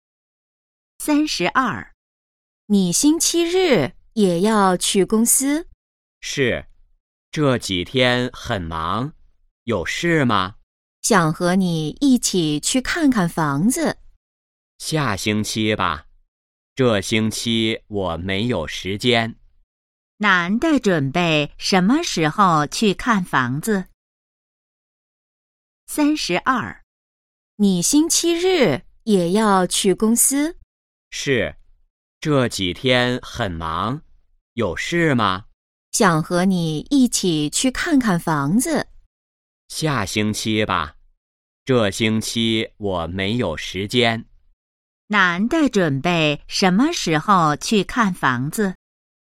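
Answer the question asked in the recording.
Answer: 下星期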